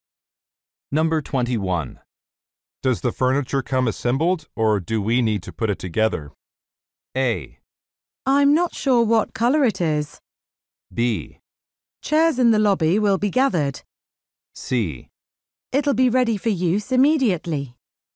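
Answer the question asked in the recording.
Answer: C: It'll be ready for use immediately.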